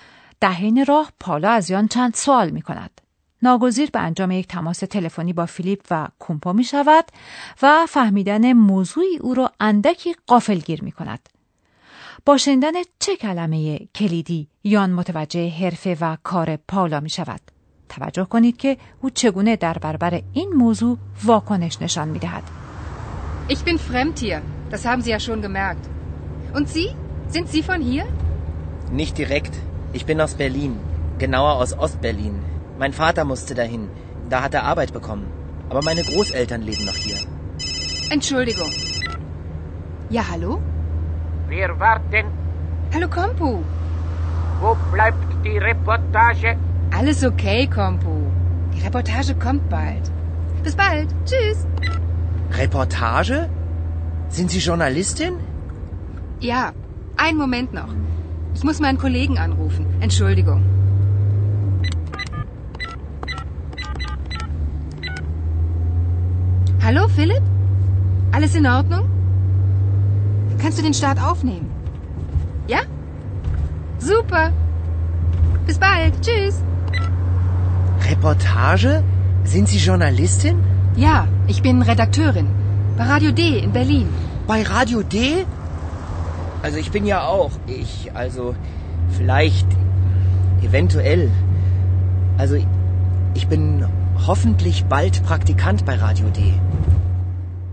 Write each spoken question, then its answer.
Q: با شنیدن چه کلمه کلیدی یان متوجه حرفه و کار پاولا می شود.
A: با شنیدن کلمه رپورتاج یان فورا متوجه می شود که پالا خبرنگار است.